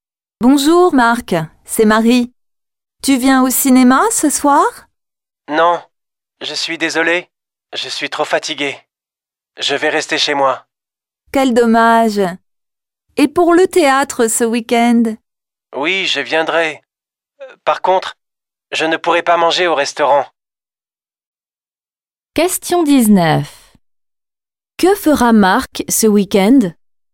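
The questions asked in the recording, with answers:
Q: Que fera Marc ce week-end?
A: Il ira au théâtre (mais il ne mangera pas au restaurant).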